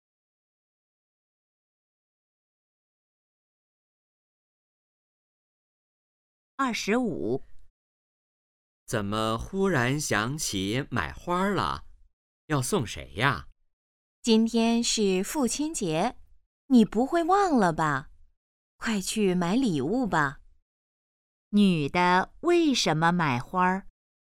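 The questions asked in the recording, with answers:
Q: 女的为什么买花?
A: 今天是父亲节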